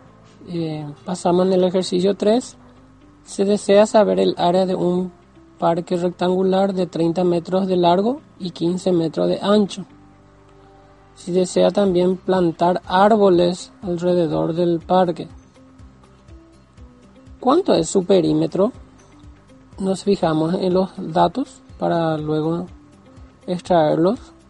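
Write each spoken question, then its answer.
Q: ¿Cuánto es su perímetro?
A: 90 metros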